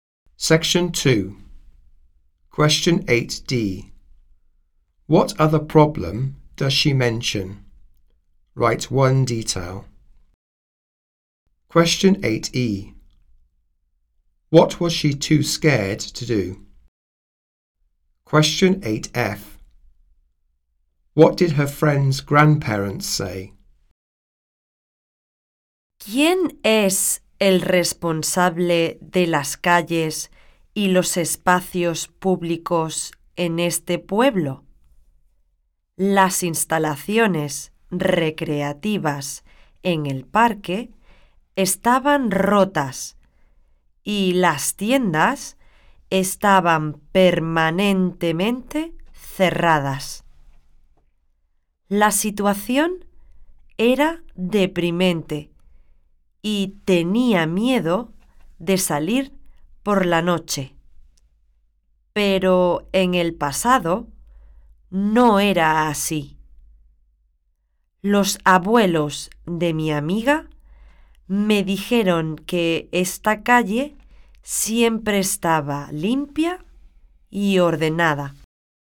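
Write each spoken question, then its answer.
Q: What other problem does she mention?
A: Broken park facilities or permanently closed shops

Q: What was she too scared to do?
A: Go out at night

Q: What did her friend's grandparents say?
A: The street was always clean and tidy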